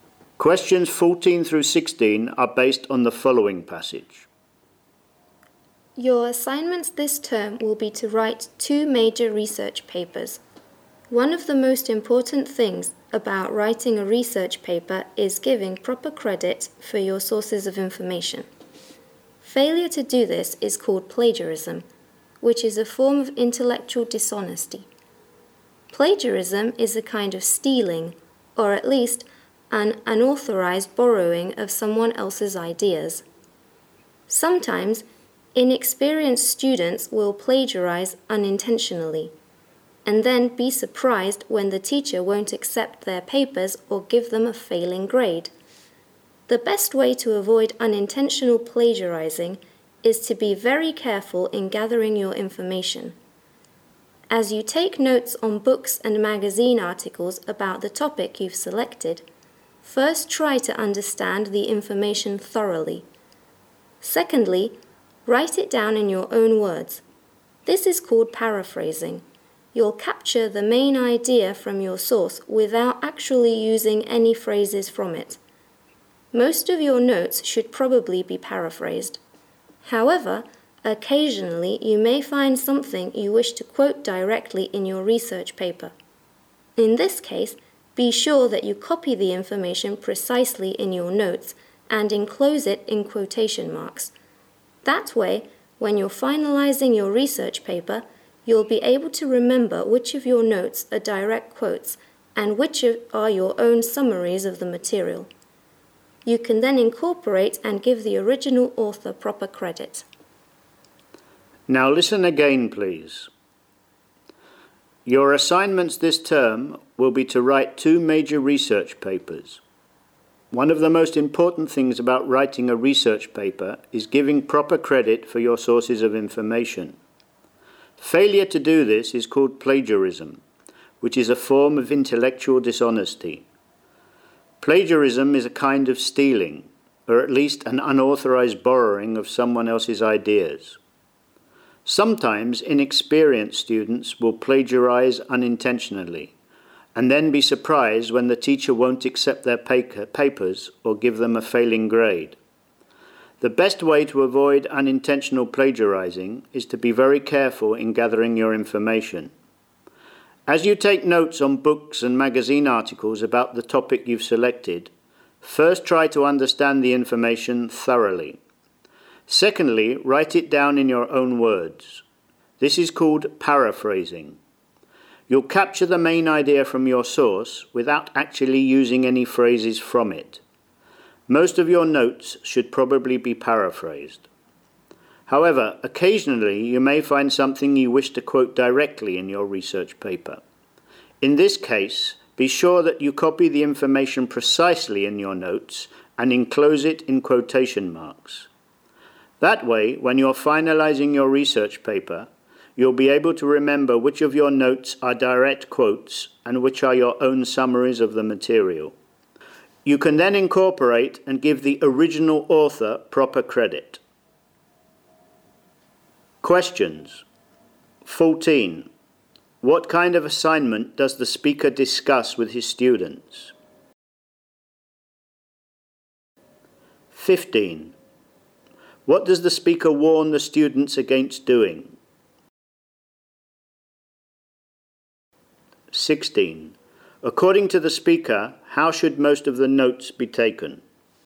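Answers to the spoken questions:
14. Writing research papers
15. Plagiarism
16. Paraphrased in their own words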